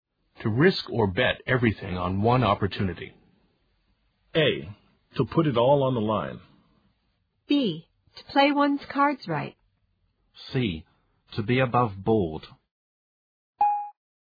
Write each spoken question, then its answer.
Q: to risk or bet everything on one opportunity.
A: The answer is A. To put it all on the line.